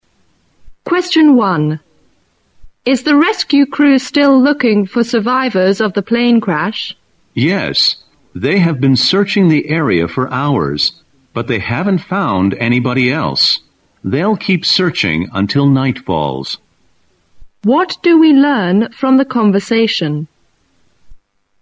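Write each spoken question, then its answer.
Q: What do we learn from the conversation?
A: The rescue crew is still searching for survivors.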